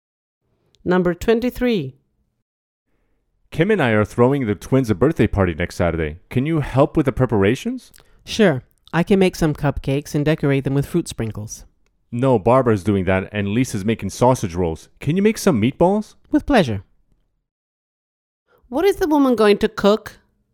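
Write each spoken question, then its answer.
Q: What is the woman going to cook?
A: meatballs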